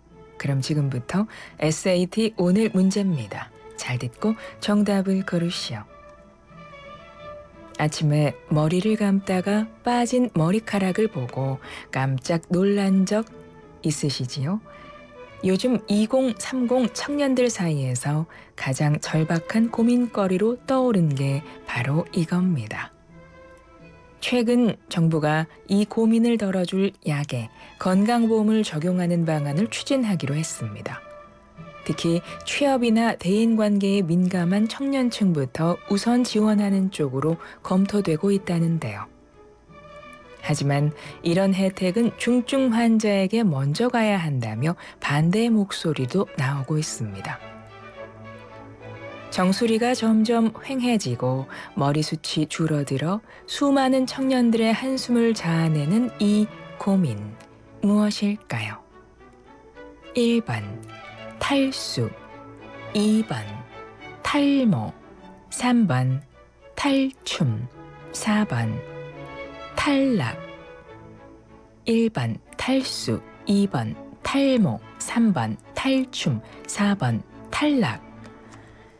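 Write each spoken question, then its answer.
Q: 정수리가 점점 휑해지고 머리숱이 줄어들어 수많은 청년들의 한숨을 자아내는 이 고민, 무엇일까요?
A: 2: 탈모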